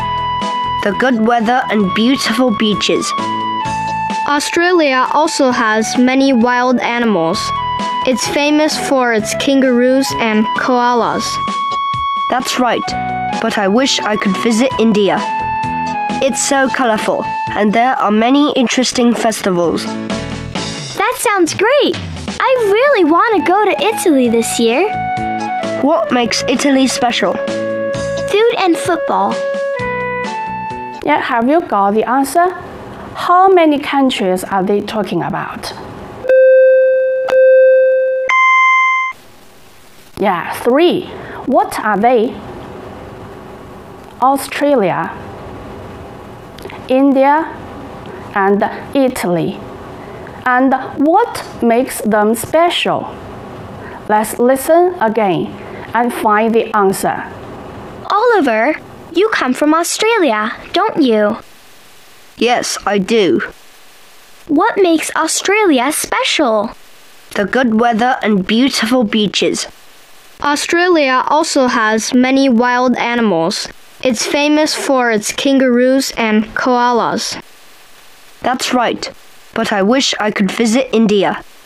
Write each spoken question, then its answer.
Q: How many countries are they talking about?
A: Yeah, three. What are they?